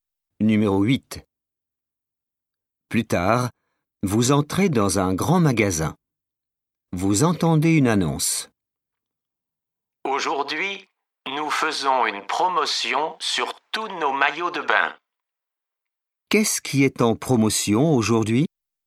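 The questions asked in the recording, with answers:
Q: Qu'est-ce qui est en promotion aujourd'hui?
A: Les maillots de bain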